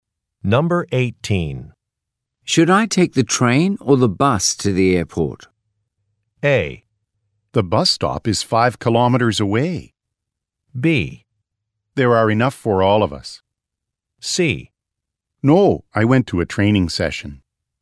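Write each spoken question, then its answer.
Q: Should I take the train or the bus to the airport?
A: A: The bus stop is 5 kilometers away.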